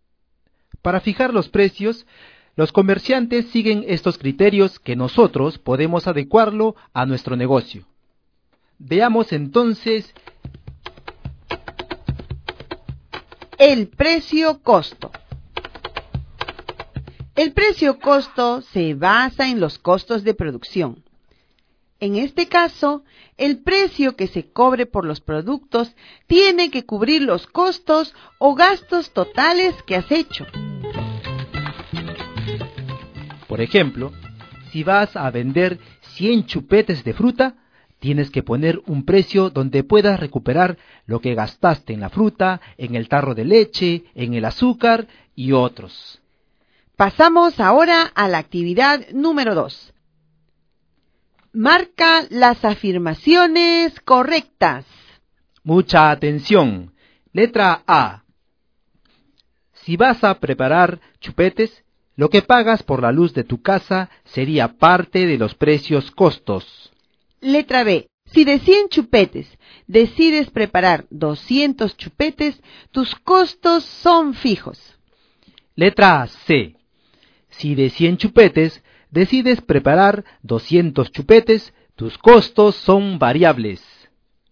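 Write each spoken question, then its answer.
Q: Si de 100 chupetes decides preparar 200 chupetes, tus costos son fijos.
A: Incorrecta

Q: Si de 100 chupetes decides preparar 200 chupetes, tus costos son variables.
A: Correcta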